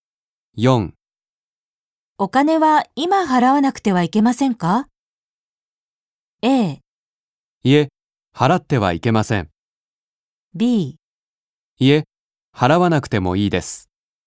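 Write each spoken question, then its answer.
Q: お金は今払わなくてはいけませんか?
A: B: いえ、払わなくてもいいです。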